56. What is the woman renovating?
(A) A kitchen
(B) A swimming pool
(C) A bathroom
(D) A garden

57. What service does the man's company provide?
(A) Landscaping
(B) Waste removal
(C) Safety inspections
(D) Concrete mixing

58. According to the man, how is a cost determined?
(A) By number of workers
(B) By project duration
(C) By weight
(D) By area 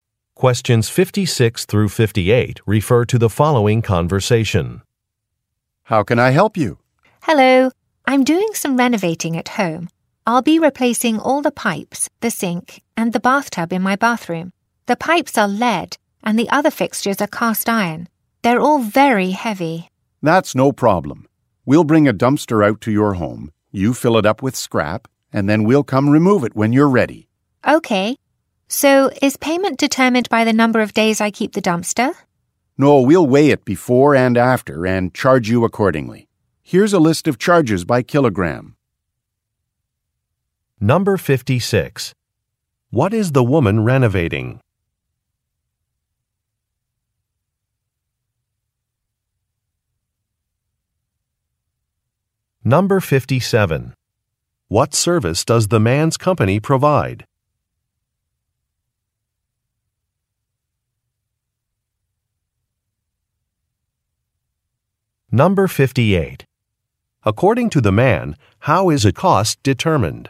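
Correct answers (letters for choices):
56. C
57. B
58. C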